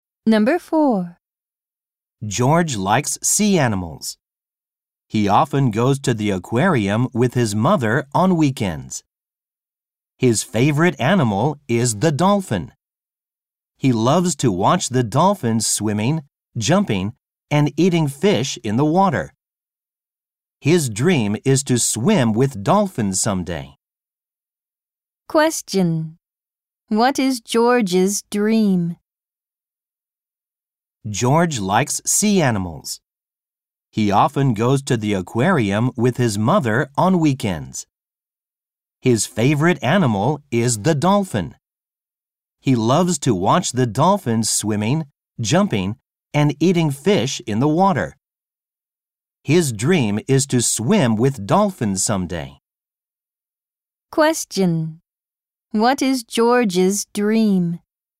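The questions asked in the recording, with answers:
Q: What is George's dream?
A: To swim with dolphins someday.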